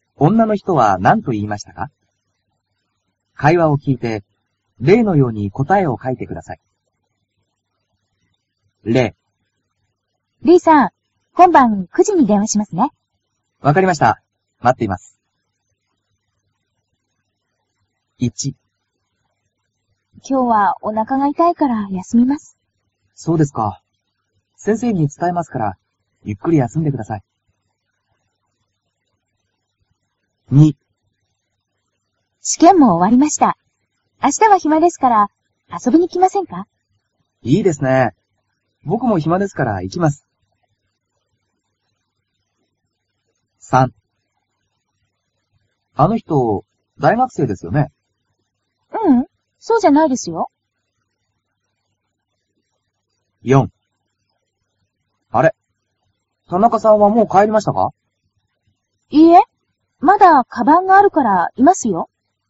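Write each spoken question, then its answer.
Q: 女の人は何と言いましたか?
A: 明日は暇ですから、遊びに来ませんか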